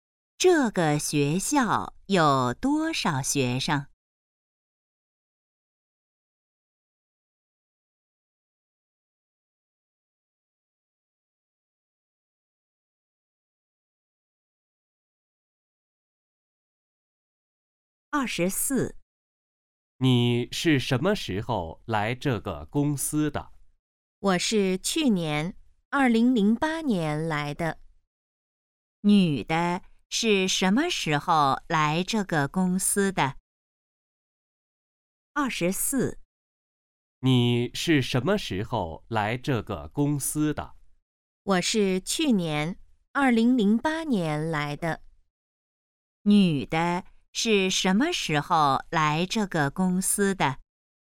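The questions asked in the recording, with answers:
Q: 女的是什么时候来这个公司的?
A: 2008年(去年)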